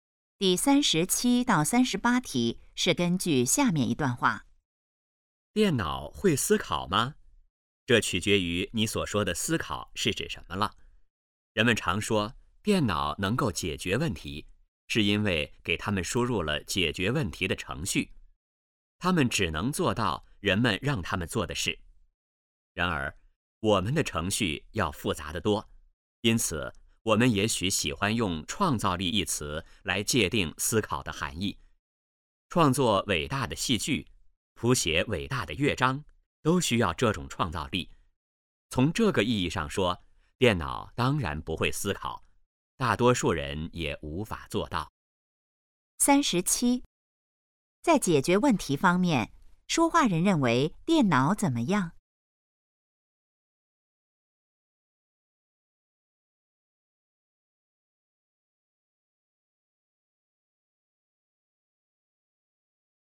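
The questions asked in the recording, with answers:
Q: 在解决问题方面,说话人认为电脑怎么样?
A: 只能做人们让它们做的事

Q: 这段话主要谈什么?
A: 电脑会不会思考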